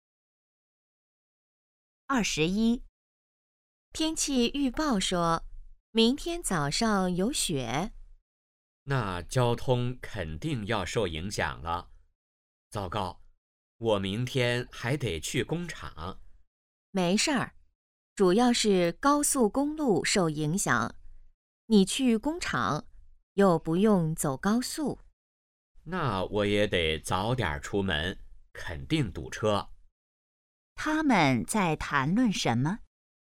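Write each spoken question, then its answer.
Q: 他们在谈论什么?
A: 下雪对交通的影响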